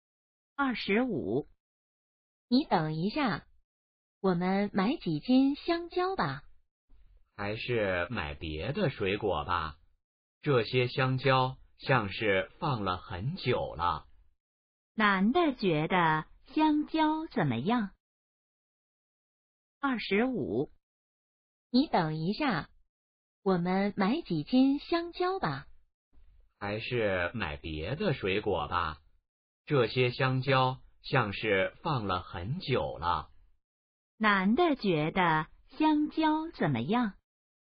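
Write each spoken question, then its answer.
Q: 男的觉得香蕉怎么样?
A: 不新鲜,放了很久了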